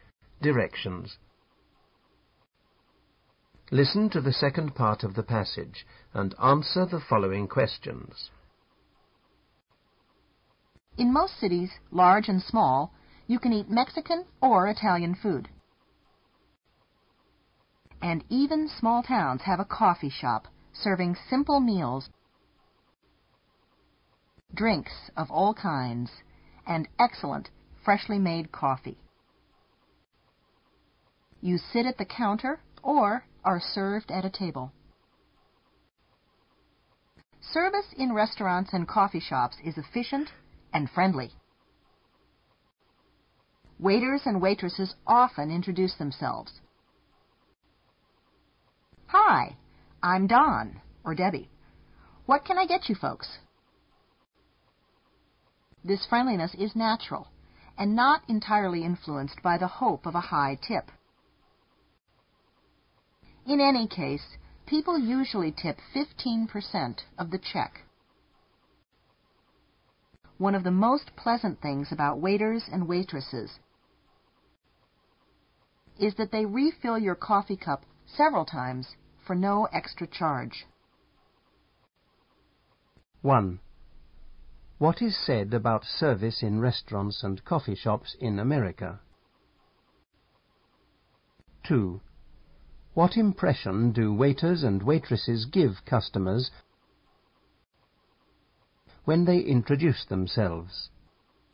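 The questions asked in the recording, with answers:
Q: What is said about service in restaurants and coffee shops in America?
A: It is efficient and friendly.

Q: What impression do waiters and waitresses give customers when they introduce themselves?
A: They seem friendly; the friendliness is natural, not just for a high tip.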